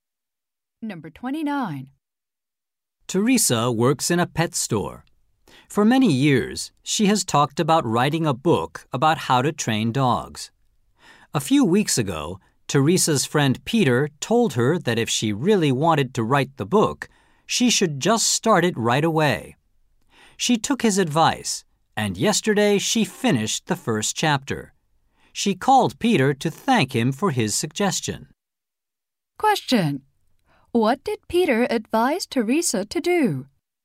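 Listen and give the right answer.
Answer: Start writing her book right away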